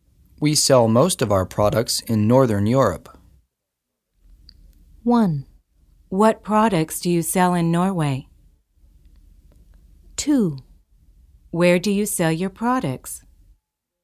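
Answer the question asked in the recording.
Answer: 2: Where do you sell your products?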